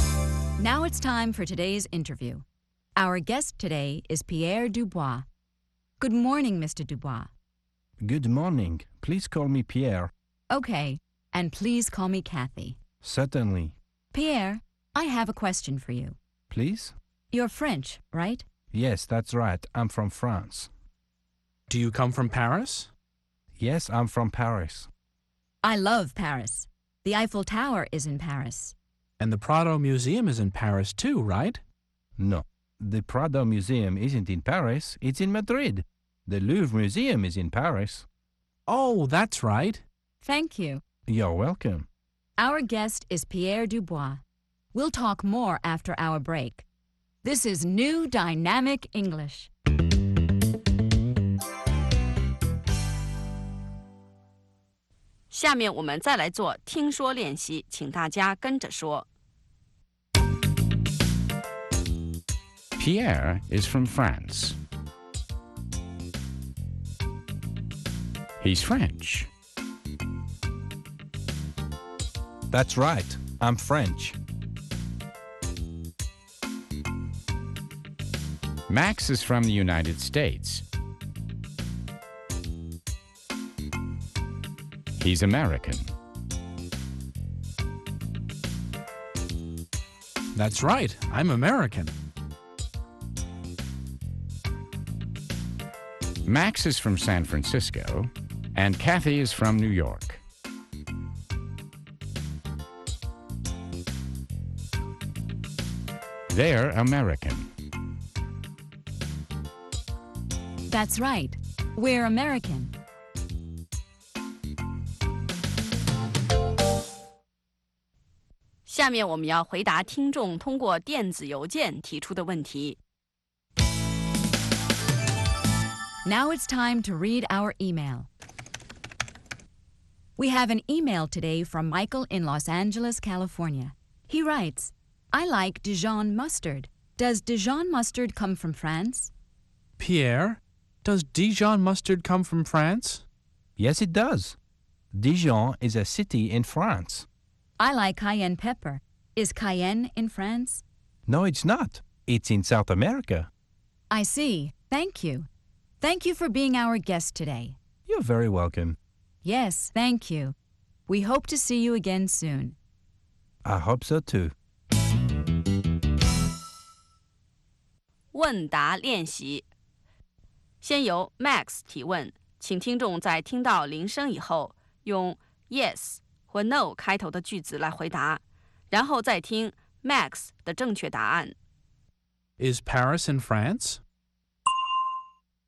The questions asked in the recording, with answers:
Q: Is Paris in France?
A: Yes, it is. Paris is in France.